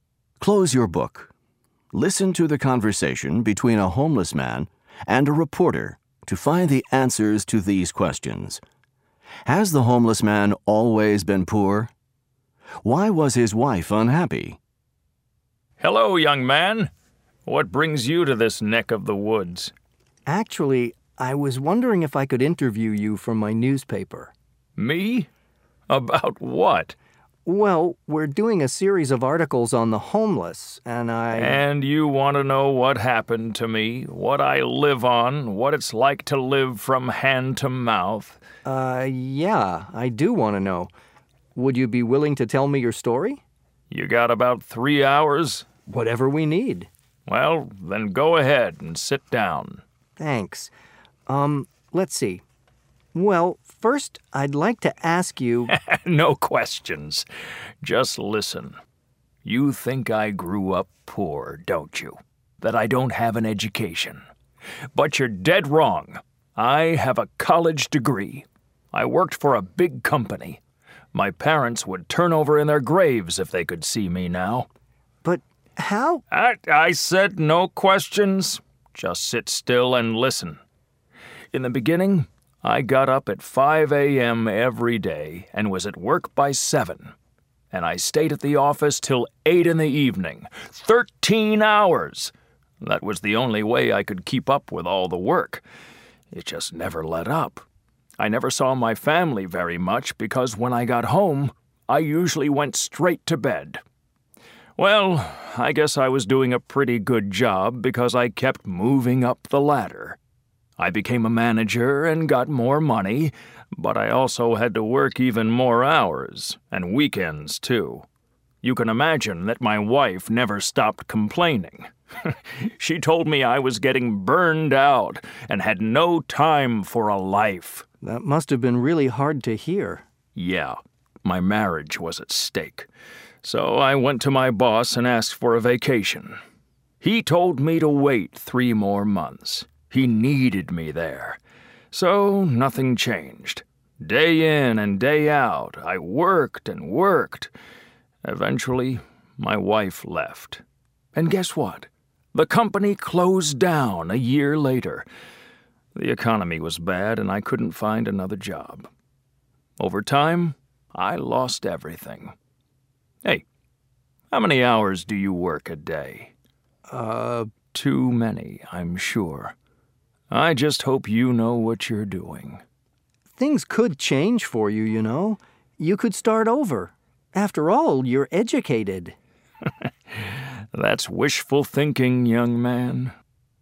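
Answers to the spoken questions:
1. No, he has a college degree and worked for a big company.
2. He worked too many hours and had no time for a life or his family.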